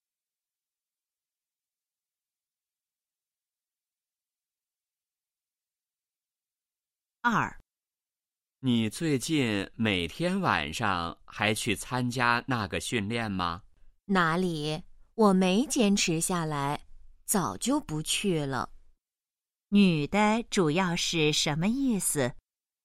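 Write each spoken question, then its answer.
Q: 女的主要是什么意思?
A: 她早就不去参加训练了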